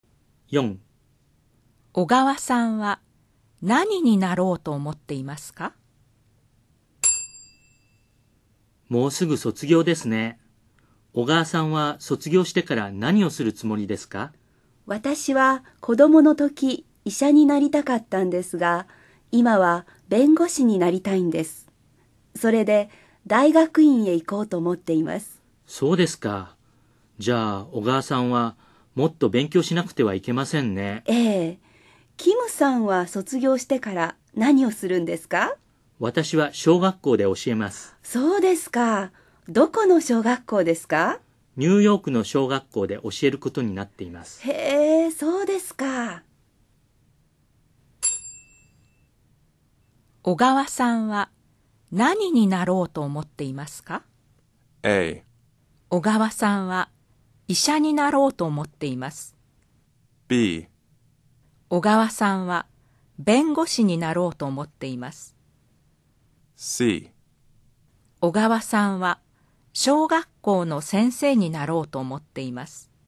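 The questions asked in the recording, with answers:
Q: 小川さんは何になろうと思っていますか?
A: B: 小川さんは弁護士になろうと思っています。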